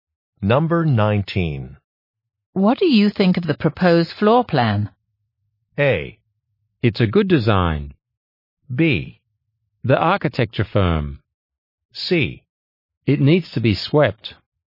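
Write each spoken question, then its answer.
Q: What do you think of the proposed floor plan?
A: A: It's a good design.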